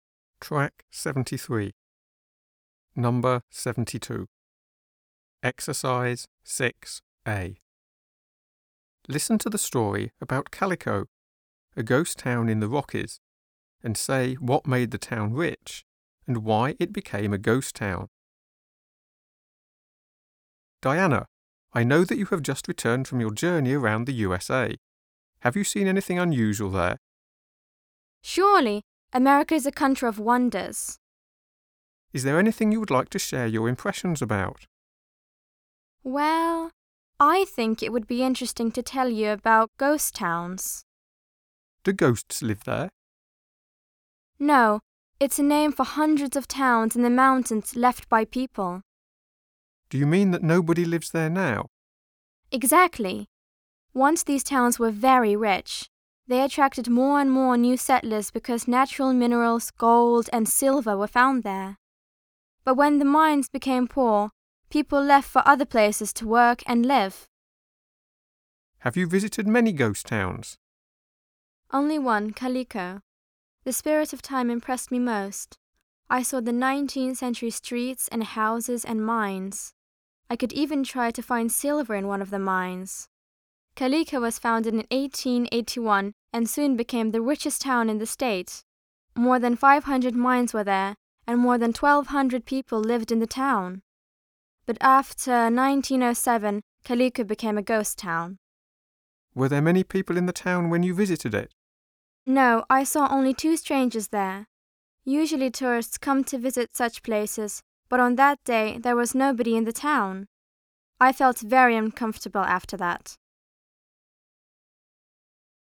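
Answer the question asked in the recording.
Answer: Silver (mines) made it rich; when the mines became poor, people left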